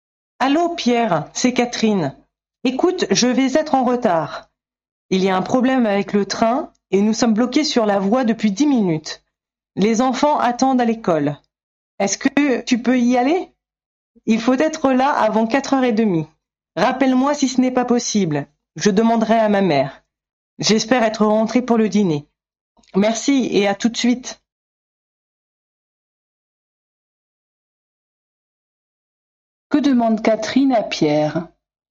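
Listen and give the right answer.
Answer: D'aller chercher les enfants à l'école avant 4h30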